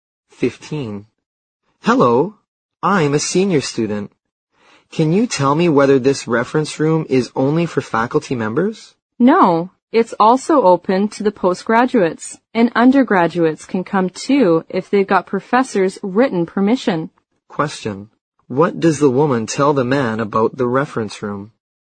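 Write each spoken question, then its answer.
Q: What does the woman tell the man about the reference room?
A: It's open to faculty and postgraduates; undergraduates need professors' written permission.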